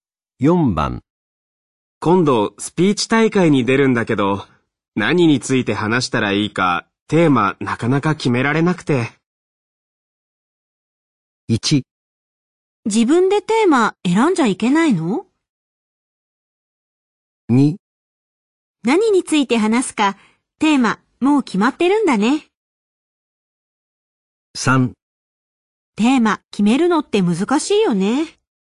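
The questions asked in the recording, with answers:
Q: 今度スピーチ大会に出るんだけど、何について話したらいいか、テーマなかなか決められなくて。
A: 3: テーマ決めるのって難しいよね。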